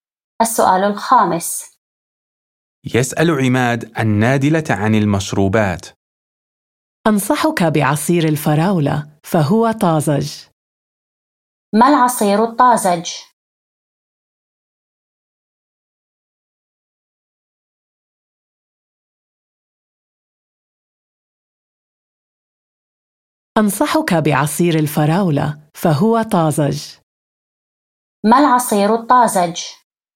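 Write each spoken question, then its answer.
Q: ما العصير الطازج؟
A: عصير الفراولة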